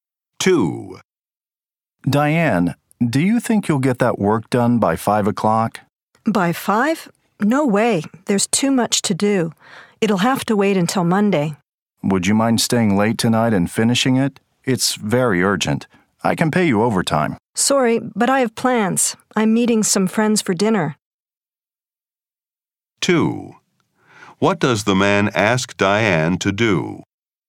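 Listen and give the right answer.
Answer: Stay late tonight and finish the work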